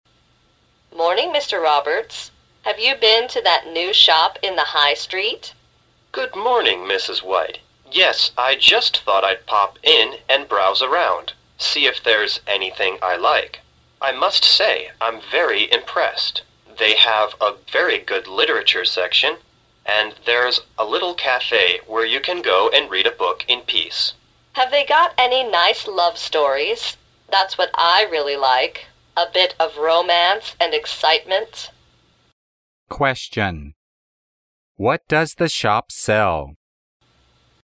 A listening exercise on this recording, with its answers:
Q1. What does the shop sell?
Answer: Books.

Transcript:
W: Morning, Mr. Roberts, have you been to that new shop in the High Street?
M: Good morning, Mrs. White. Yes, I just thought I pop in and browse around, seeing if there is anything I like. I must say I'm very impressed. They have a very good literature section and there is a little café where you can go and read a book in peace.
W: Have they got any nice love stories? That's what I really like, a bit of romance and excitement.
Question: What does the shop sell?